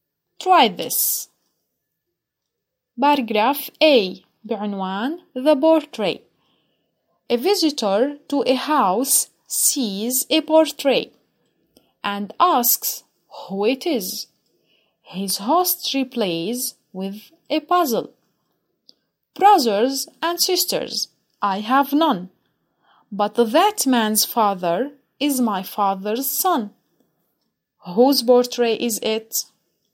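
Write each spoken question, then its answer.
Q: Whose portrait is it?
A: The host's son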